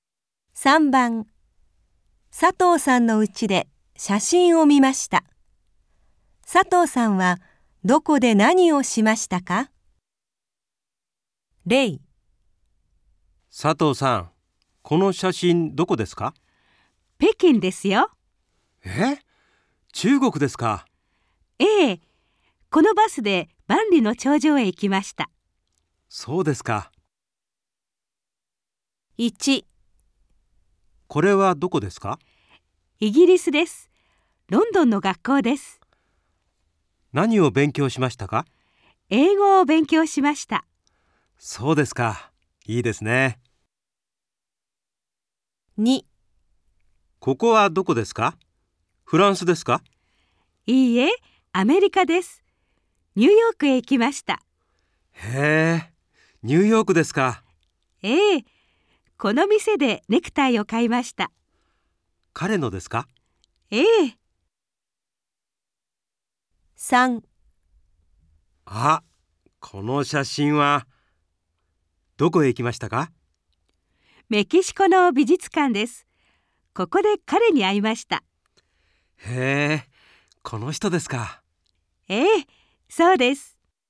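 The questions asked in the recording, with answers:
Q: 佐藤さんはどこで何をしましたか?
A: イギリス(ロンドン)の学校で英語を勉強しました

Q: 佐藤さんはどこで何をしましたか?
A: アメリカ(ニューヨーク)の店でネクタイを買いました

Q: 佐藤さんはどこで何をしましたか?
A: メキシコの美術館で彼に会いました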